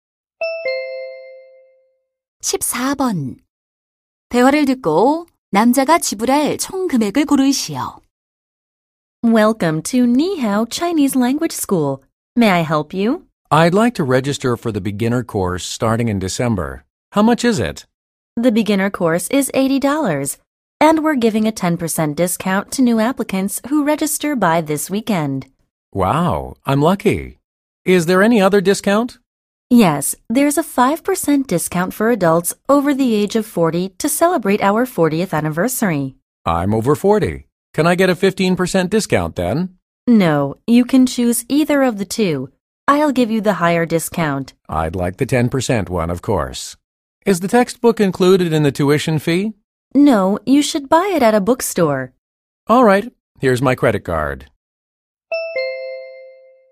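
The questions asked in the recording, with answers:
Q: 대화를 듣고 남자가 지불할 총 금액을 고르시오.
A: $72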